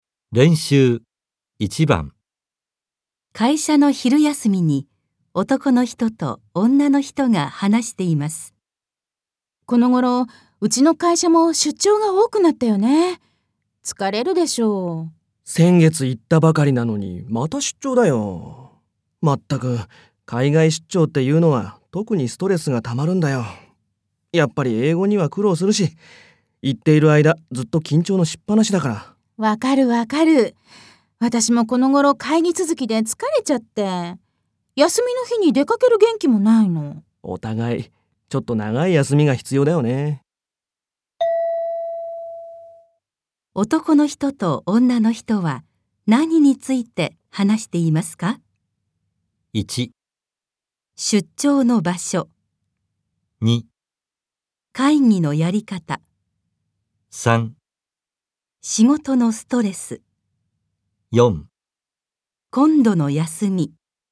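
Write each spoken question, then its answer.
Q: 男の人と女の人は何について話していますか?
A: 3: 仕事のストレス。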